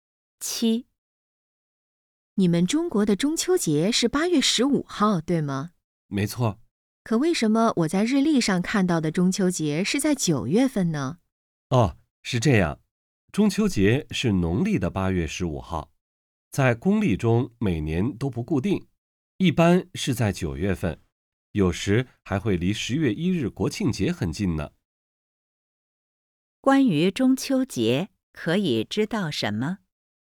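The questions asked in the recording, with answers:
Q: 关于中秋节,可以知道什么?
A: 中秋节是农历八月十五,公历一般在九月份,日期不固定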